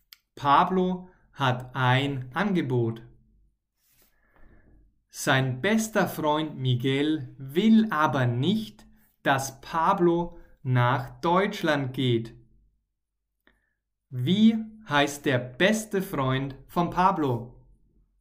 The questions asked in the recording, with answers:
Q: Wie heißt der beste Freund von Pablo?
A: Miguel, Pablos bester Freund heißt Miguel.